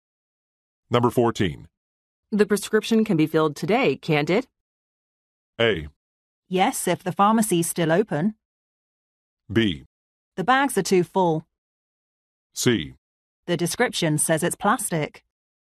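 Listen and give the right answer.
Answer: A: Yes, if the pharmacy's still open.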